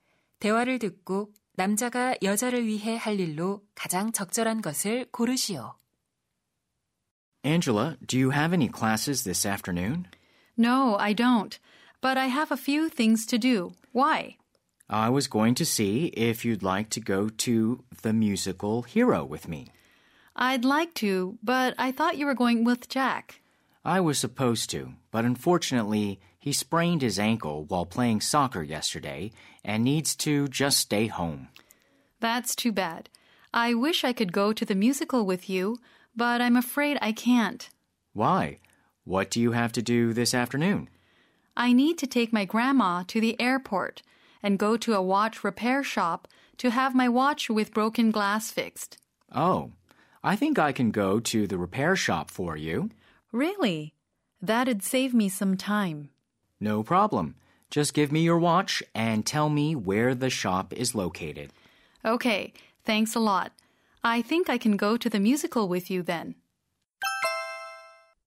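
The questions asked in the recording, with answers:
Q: 대화를 듣고 남자가 여자를 위해 할 일로 가장 적절한 것을 고르시오.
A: 시계 수리점에 시계 맡기기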